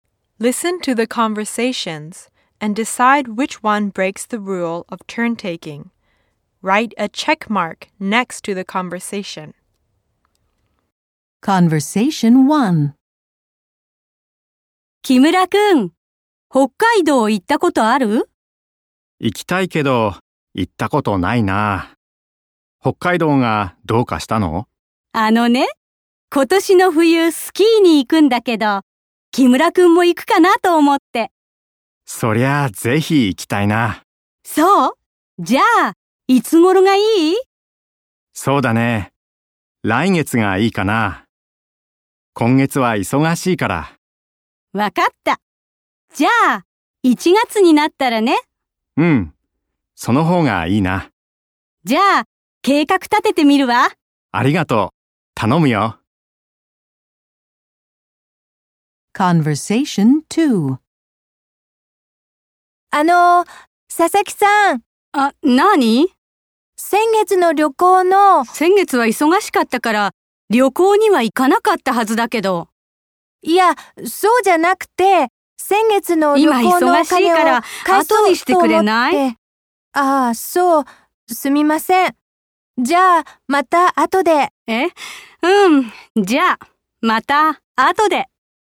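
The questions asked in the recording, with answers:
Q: Listen to the conversations and decide which one breaks the rule of turn-taking.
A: Conversation 2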